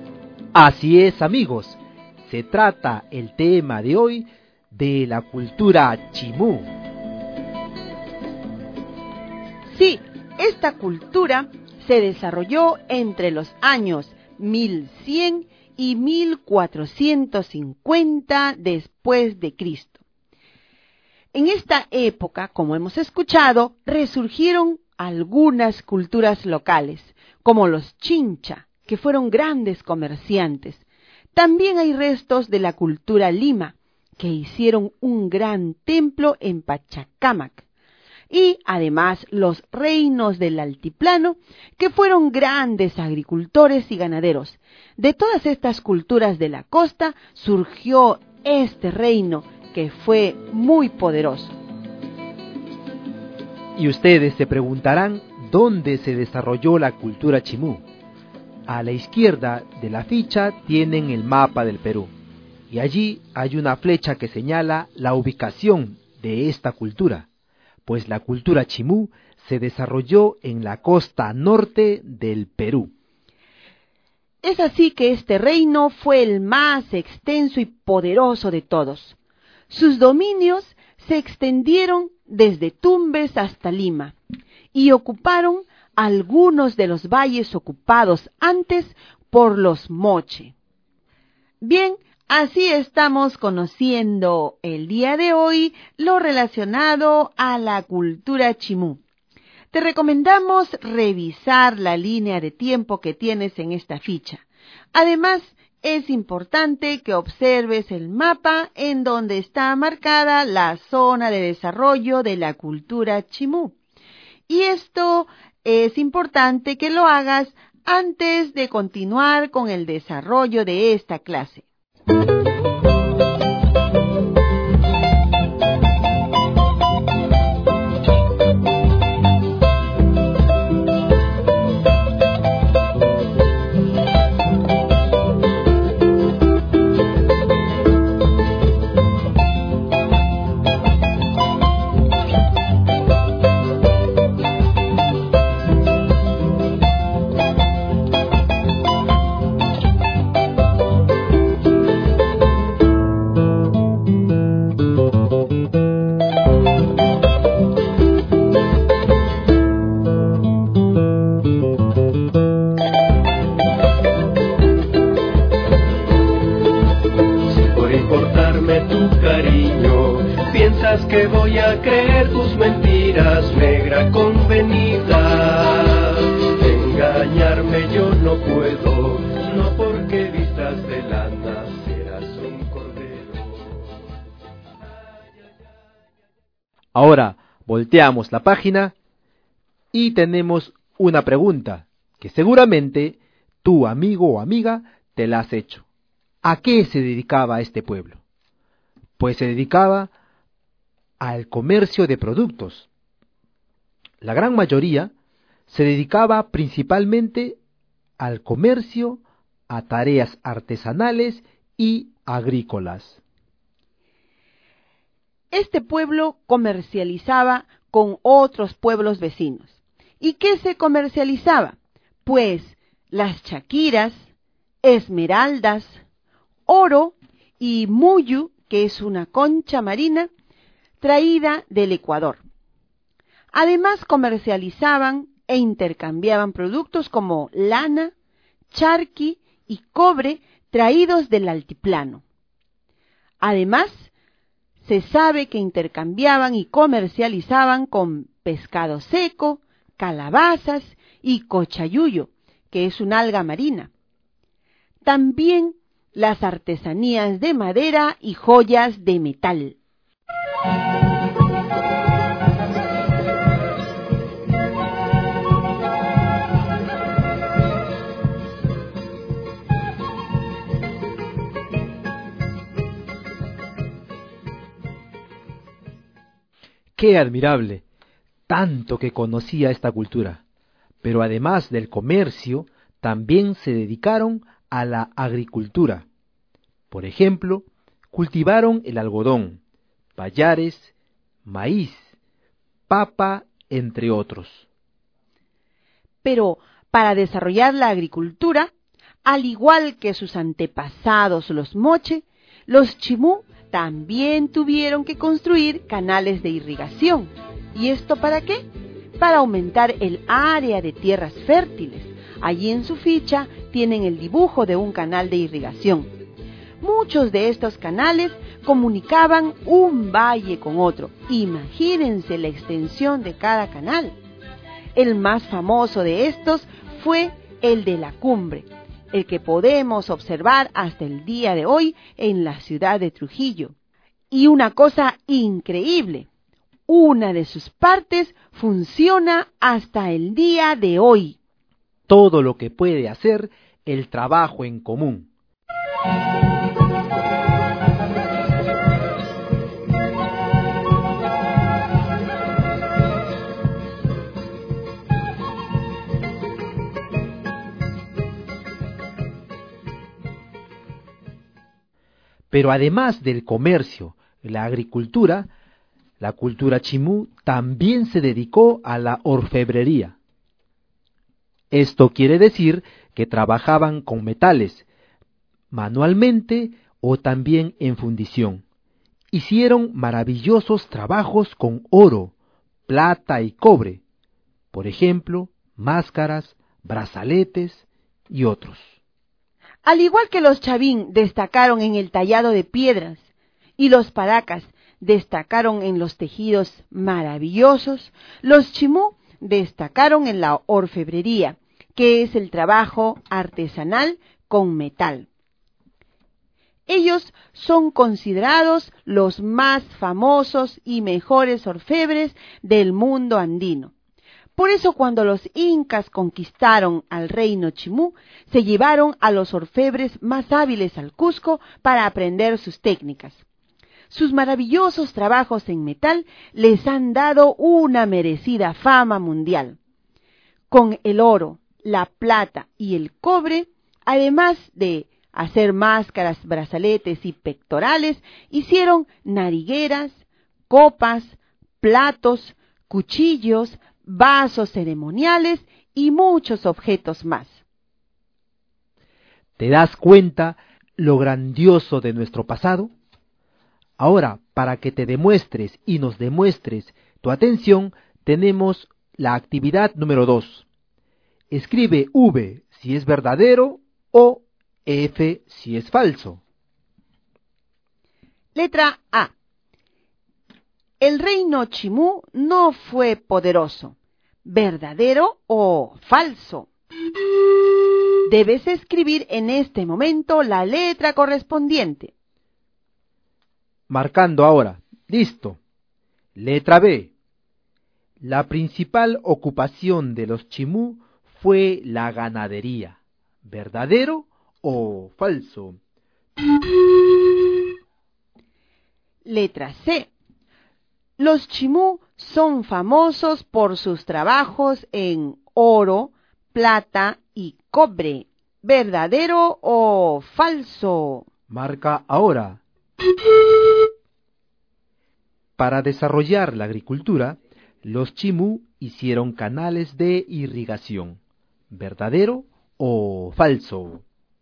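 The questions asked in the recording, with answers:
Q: Letra A. El reino Chimú no fue poderoso.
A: Falso

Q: La principal ocupación de los Chimú fue la ganadería.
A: Falso

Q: Letra C. Los Chimú son famosos por sus trabajos en oro, plata y cobre.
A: Verdadero

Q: Para desarrollar la agricultura, los Chimú hicieron canales de irrigación.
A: Verdadero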